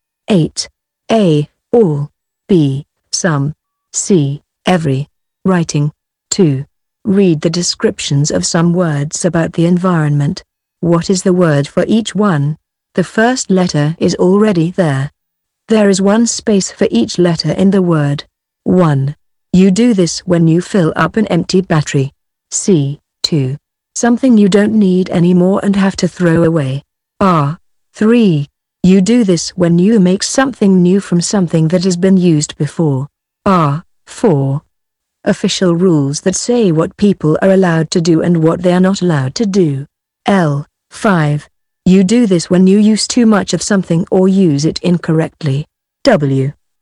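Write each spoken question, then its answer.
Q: You do this when you fill up an empty battery.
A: charge

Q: Something you don't need anymore and have to throw away.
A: rubbish

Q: You do this when you make something new from something that has been used before.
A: recycle

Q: Official rules that say what people are allowed to do and what they are not allowed to do.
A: laws

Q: You do this when you use too much of something or use it incorrectly.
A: waste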